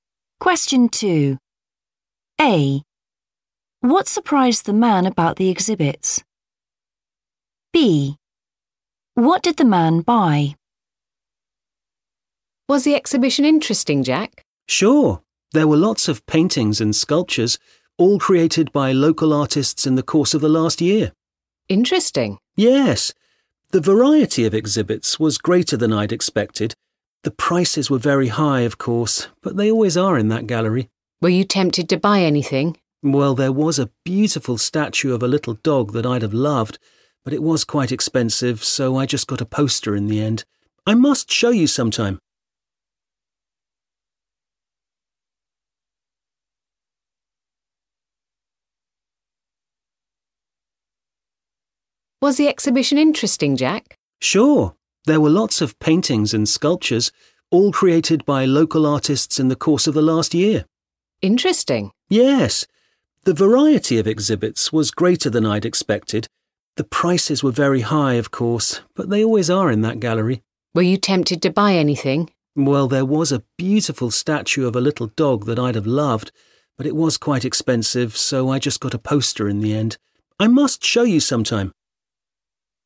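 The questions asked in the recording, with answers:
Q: What surprised the man about the exhibits?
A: their variety

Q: What did the man buy?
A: a poster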